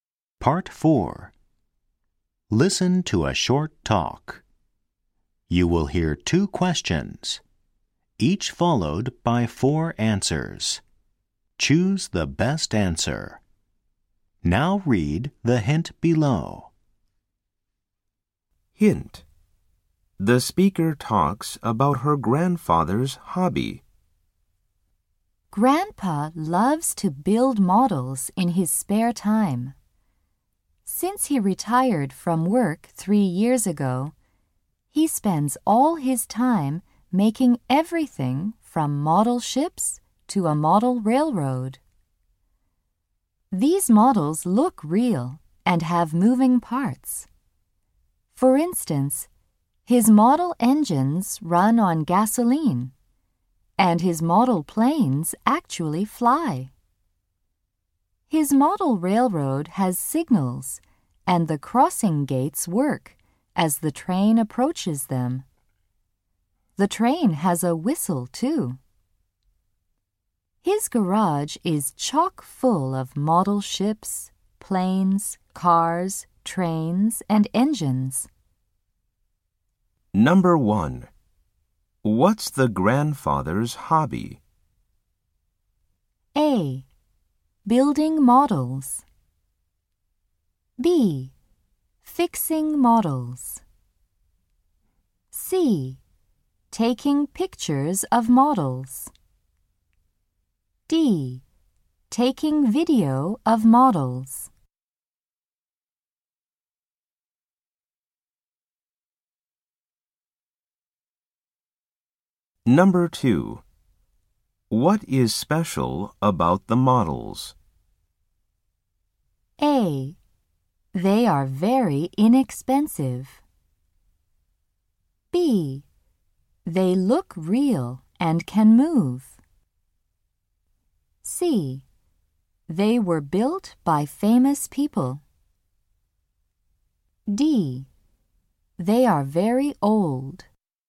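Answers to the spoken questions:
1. A: Building models.
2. B: They look real and can move.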